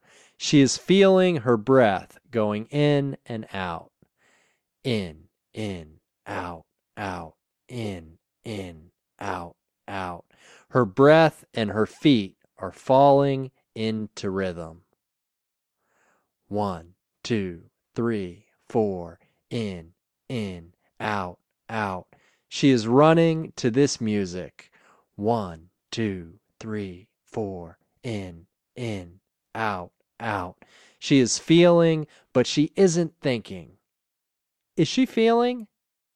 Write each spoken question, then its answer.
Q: Is she feeling?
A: Yes, she is feeling.